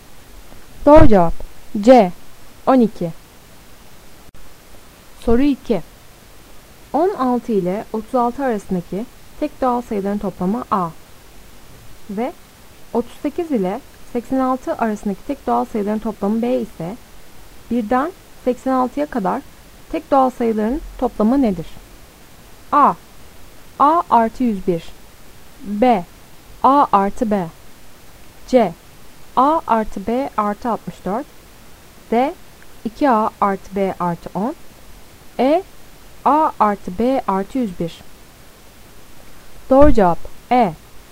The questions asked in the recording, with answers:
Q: 16 ile 36 arasındaki tek doğal sayıların toplamı A ve 38 ile 86 arasındaki tek doğal sayıların toplamı B ise 1'den 86'ya kadar tek doğal sayıların toplamı nedir?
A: Doğru cevap E.